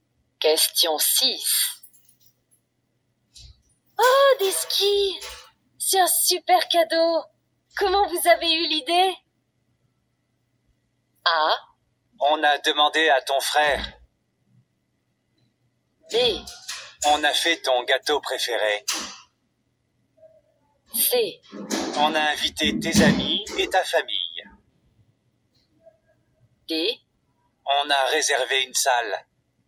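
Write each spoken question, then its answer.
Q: Comment vous avez eu l'idée?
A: A: On a demandé à ton frère.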